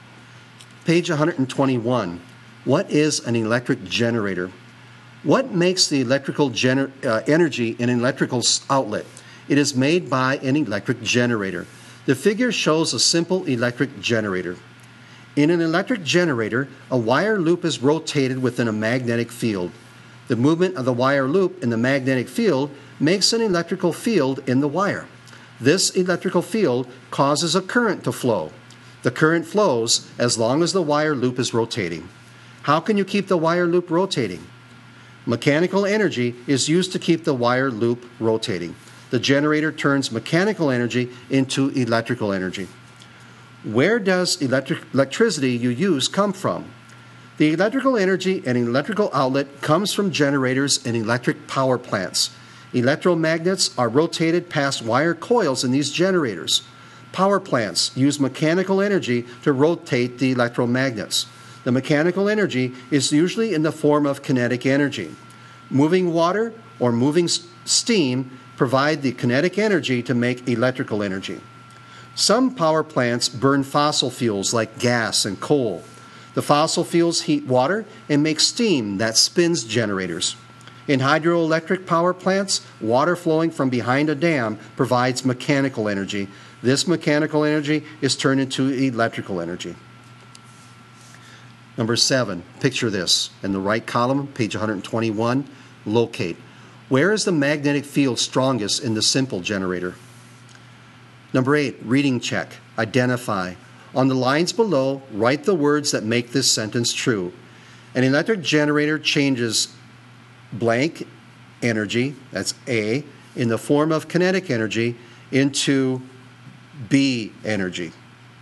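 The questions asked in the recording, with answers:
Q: An electric generator changes blank energy, that's A, in the form of kinetic energy into B energy.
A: A: mechanical; B: electrical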